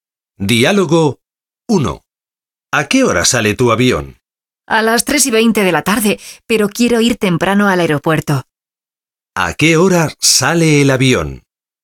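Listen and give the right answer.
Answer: A las 3:20 de la tarde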